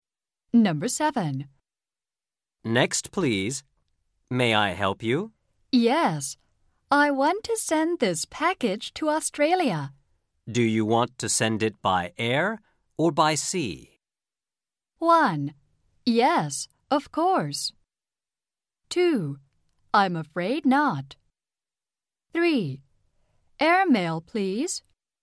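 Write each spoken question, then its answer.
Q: Do you want to send it by air or by sea?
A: 3: Airmail, please.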